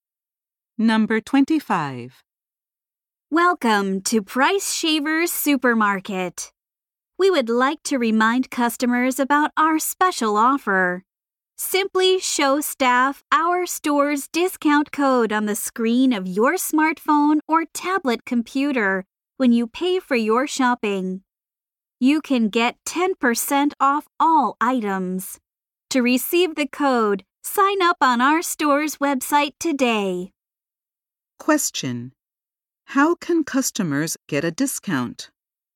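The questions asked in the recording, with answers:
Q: How can customers get a discount?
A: By showing the store's discount code on their smartphone or tablet when paying.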